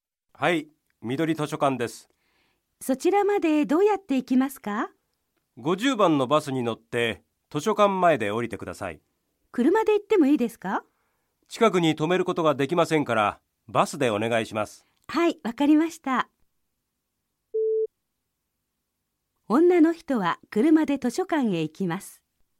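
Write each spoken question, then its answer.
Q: 女の人は車で図書館へ行きます。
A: ×(バスで行きます)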